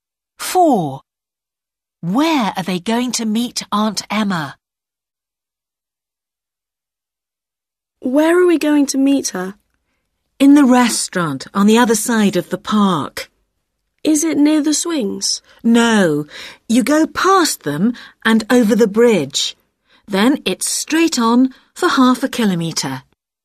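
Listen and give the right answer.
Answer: In the restaurant on the other side of the park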